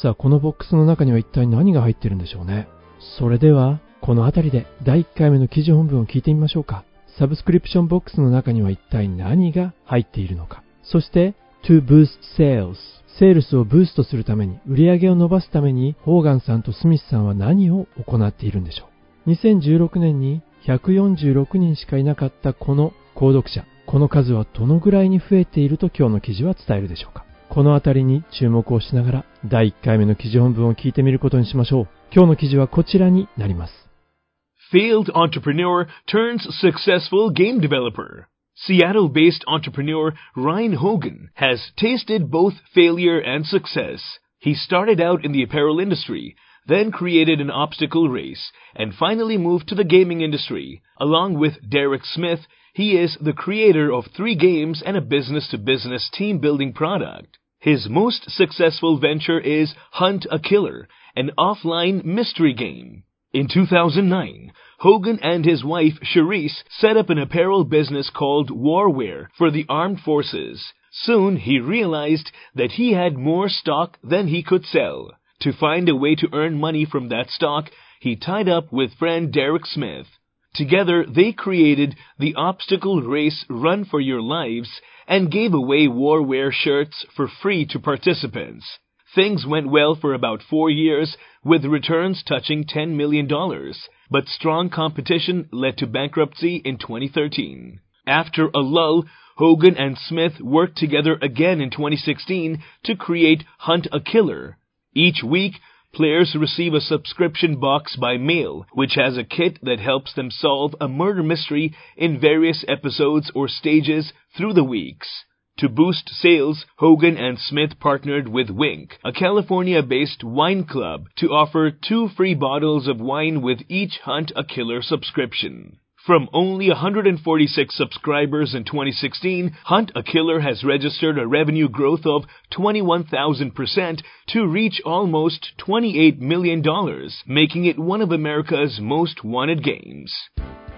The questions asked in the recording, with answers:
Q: Subscription box の中には一体何が入っているのか。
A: キットが入ってるようですね。Which has a kit.

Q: そして、to boost sales。セールスをブーストするために、売り上げを伸ばすために、ホーガンさんとスミスさんは何を行っているんでしょう。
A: このワインクラブと提携して、ハントアキラーのサブスクリプション、定期購読ごとに日本のワインを無料で提供するみたいです。